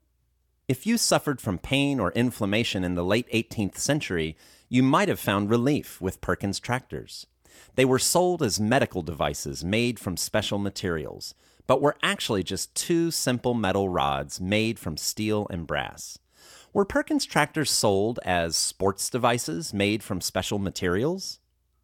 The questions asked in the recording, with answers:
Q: Were Perkins tractors sold as sports devices made from special materials?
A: No, they were not sold as sports devices made from special materials.